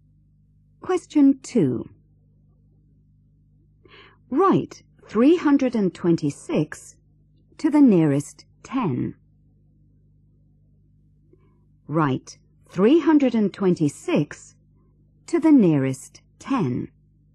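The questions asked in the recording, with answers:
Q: Write 326 to the nearest 10.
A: 330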